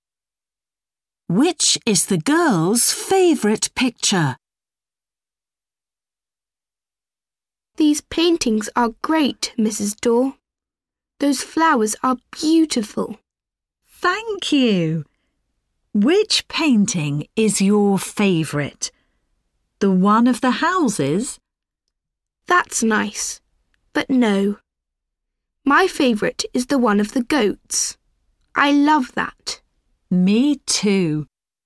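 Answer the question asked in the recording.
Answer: The one of the goats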